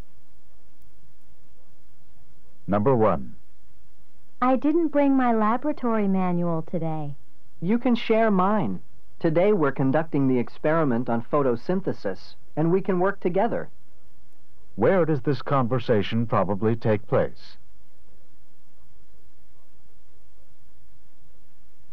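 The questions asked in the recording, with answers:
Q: Where does this conversation probably take place?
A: In a science laboratory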